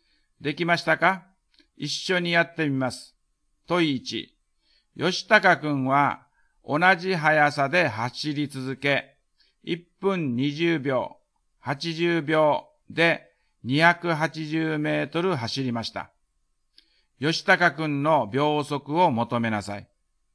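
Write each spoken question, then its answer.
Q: 吉高くんの秒速を求めなさい。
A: 秒速3.5メートル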